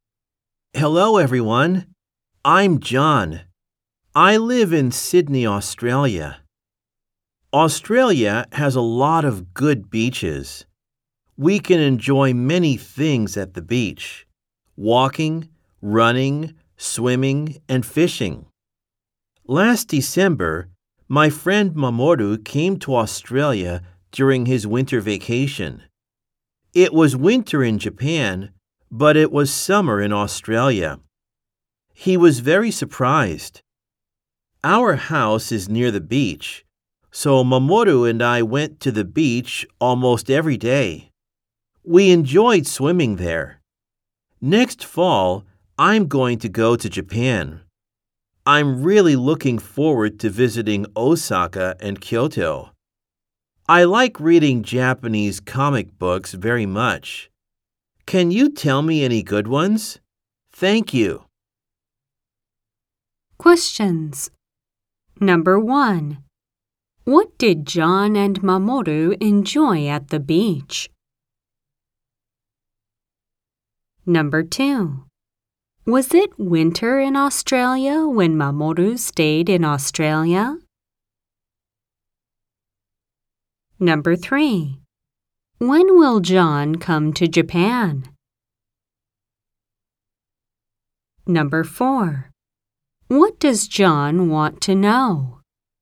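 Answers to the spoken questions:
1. Swimming
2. No, it was summer
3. Next fall
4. Good Japanese comic books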